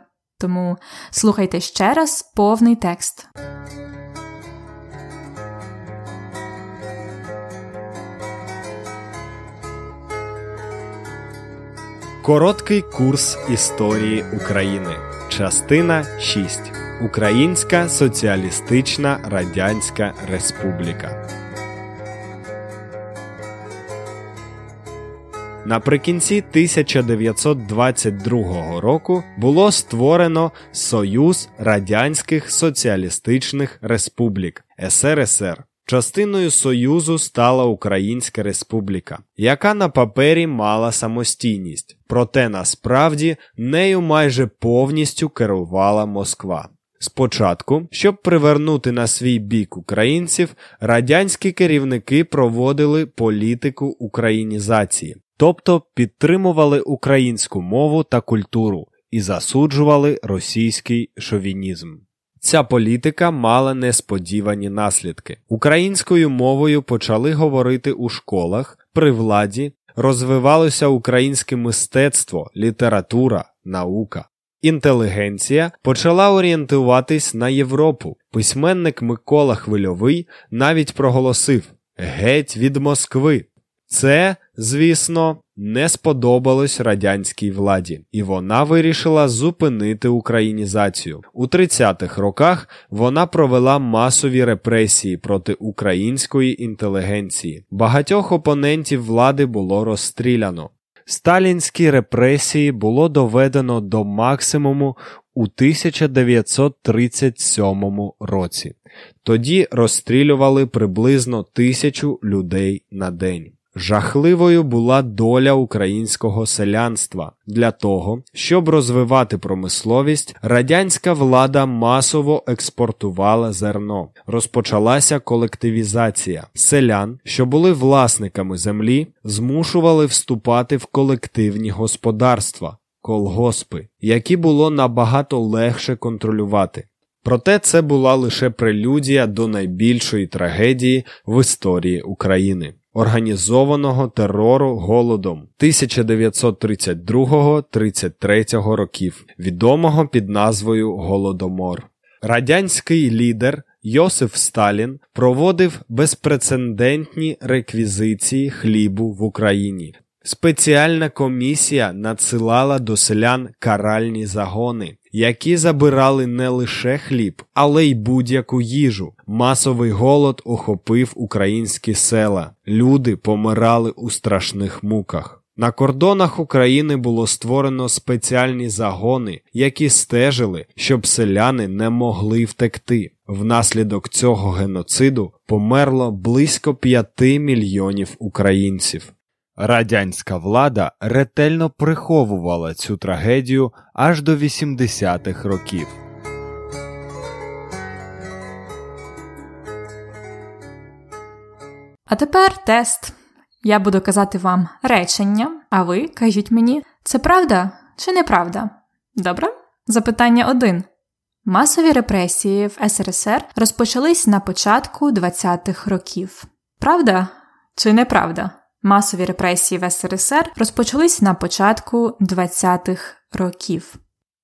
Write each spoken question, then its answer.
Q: Масові репресії в СРСР розпочались на початку 20-х років.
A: Ні, це неправда.